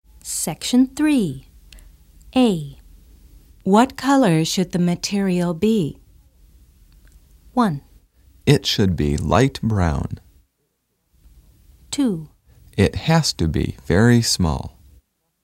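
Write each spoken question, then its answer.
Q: What color should the material be?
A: 1: It should be light brown.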